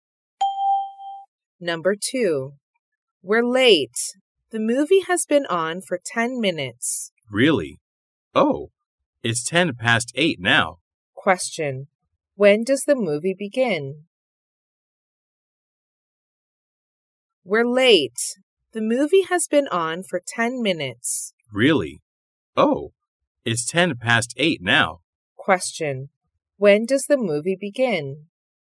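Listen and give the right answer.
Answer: At 8 o'clock.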